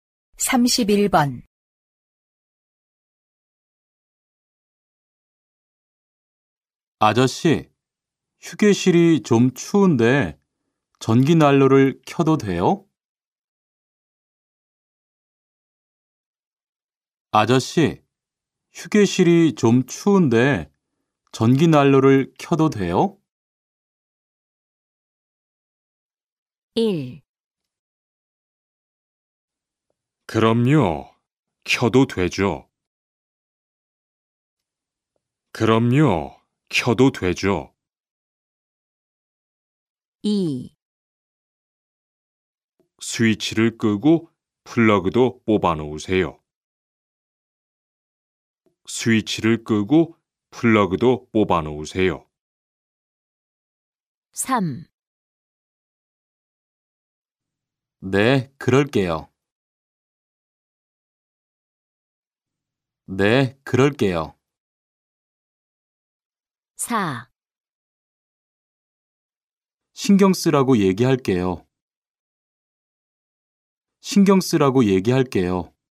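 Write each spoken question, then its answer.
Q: 아저씨, 휴게실이 좀 추운데 전기난로를 켜도 돼요?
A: 1: 그럼요. 켜도 되죠.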